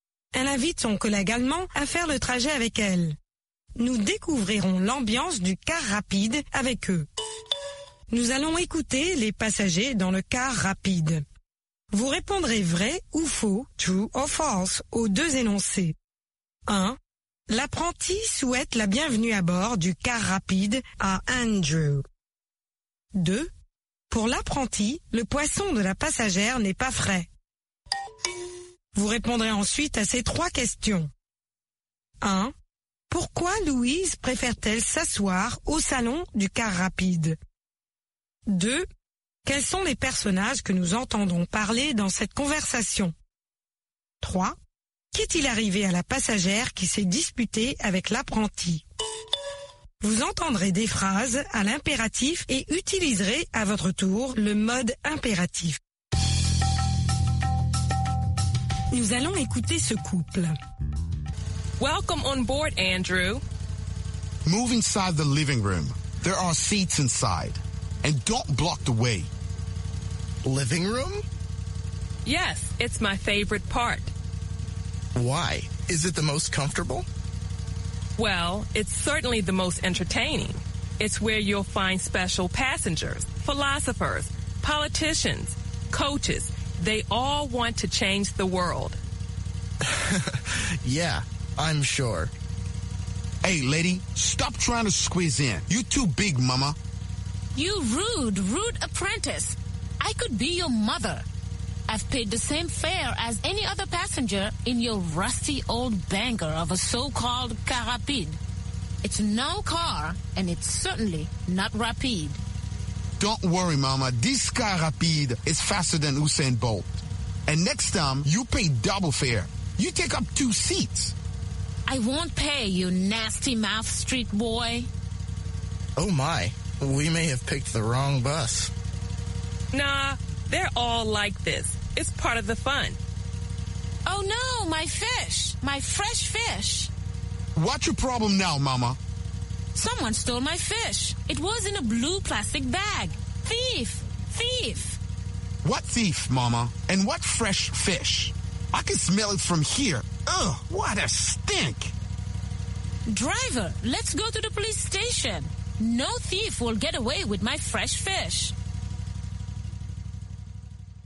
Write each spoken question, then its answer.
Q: L'apprenti souhaite la bienvenue à bord du car rapide à Andrew.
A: L'énoncé 1 est faux.

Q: Pour l'apprenti, le poisson de la passagère n'est pas frais.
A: L'énoncé 2 est vrai.

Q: Pourquoi Louise préfère-t-elle s'asseoir au salon du car rapide?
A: C'est son endroit préféré.

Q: Quels sont les personnages que nous entendons parler dans cette conversation?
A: Louise, Andrew, l'apprenti et la passagère.

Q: Qu'est-il arrivé à la passagère qui s'est disputée avec l'apprenti?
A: Quelqu'un est descendu avec son poisson frais.